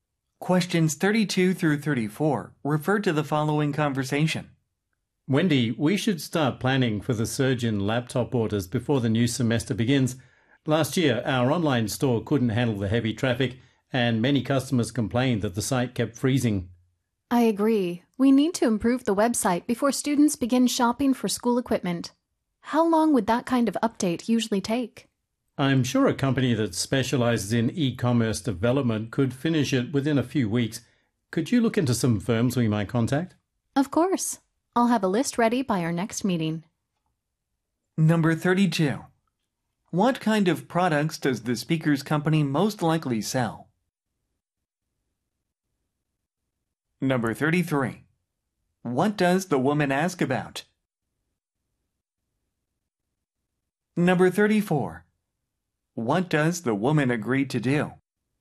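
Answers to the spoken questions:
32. Laptops
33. How long a website update would take
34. Prepare a list of firms to contact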